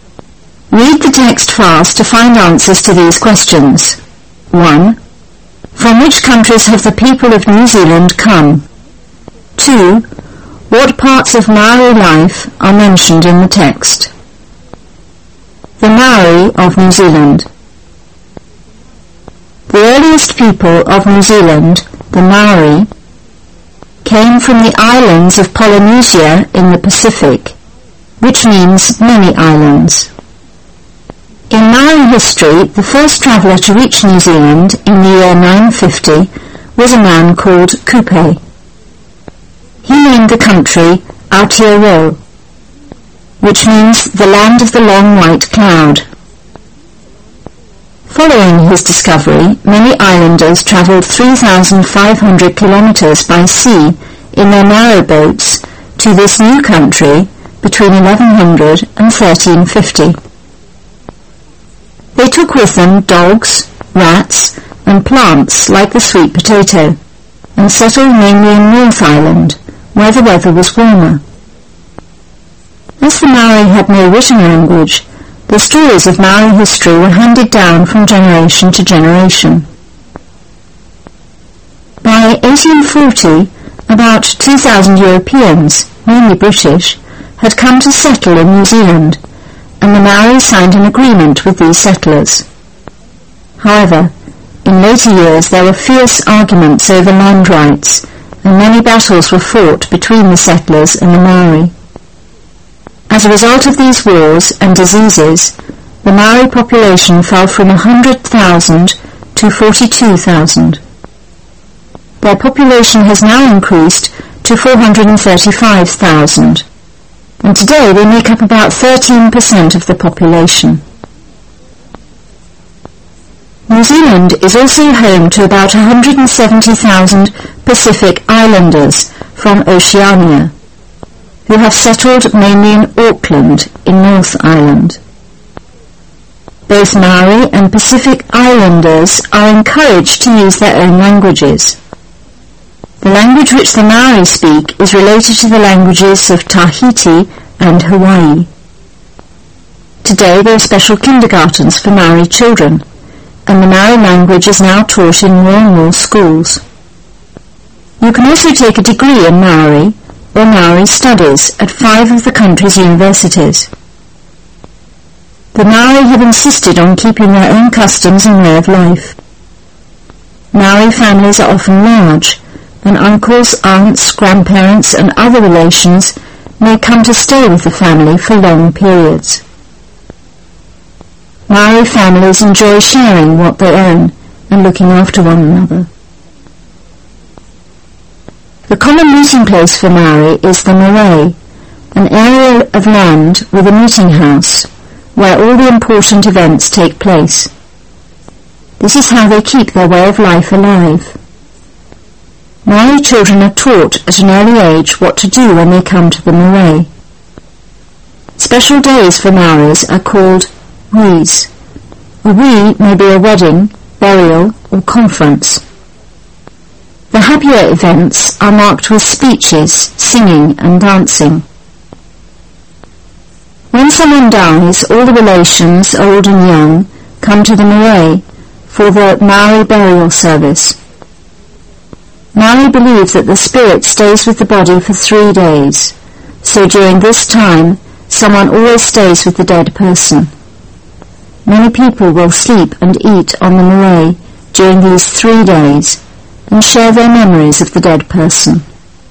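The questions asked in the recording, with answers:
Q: From which countries have the people of New Zealand come?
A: From the islands of Polynesia (the Maori), from Europe, mainly Britain, and from the Pacific Islands of Oceania

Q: What parts of Maori life are mentioned in the text?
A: Their history, language, education, family life, customs, the marae meeting place and special days such as weddings and burials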